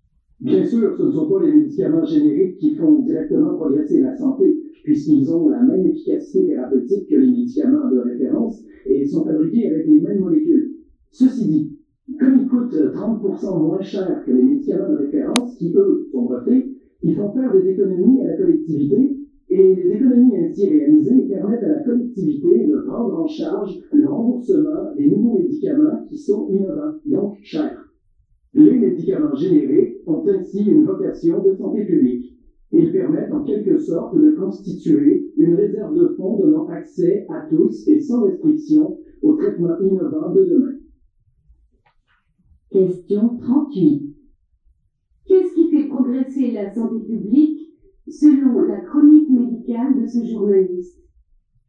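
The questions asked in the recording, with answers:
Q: Qu'est-ce qui fait progresser la santé publique selon la chronique médicale de ce journaliste?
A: Les économies réalisées grâce aux médicaments génériques, qui permettent de rembourser les nouveaux médicaments innovants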